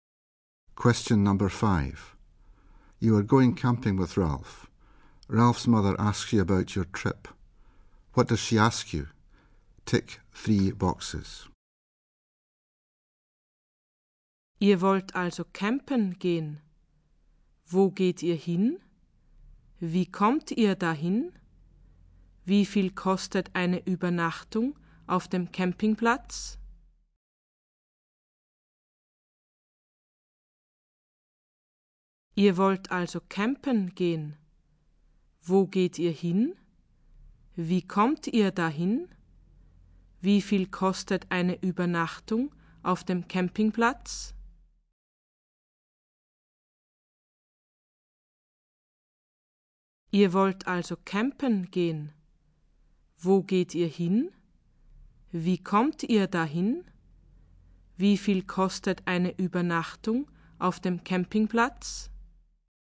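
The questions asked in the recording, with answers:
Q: What does she ask you?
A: Where you are going, how you are getting there, how much a night at the campsite costs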